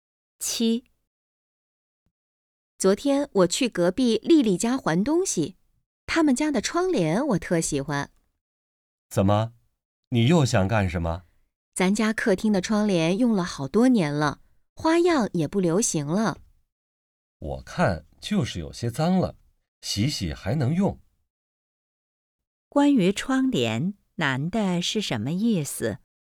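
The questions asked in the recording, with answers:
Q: 关于窗帘,男的是什么意思?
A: 窗帘只是有些脏,洗洗还能用,不用换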